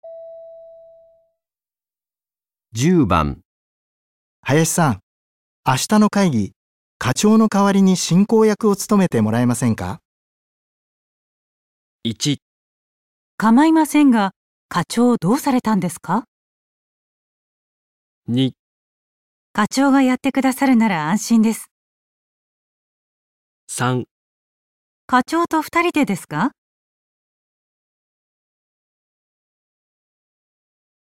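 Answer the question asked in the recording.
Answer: かまいませんが、課長どうされたんですか。

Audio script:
10、林さん、明日の会議、課長の代わりに進行役を務めてもらえませんか。
1かまいませんが、課長どうされたんですか。

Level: N2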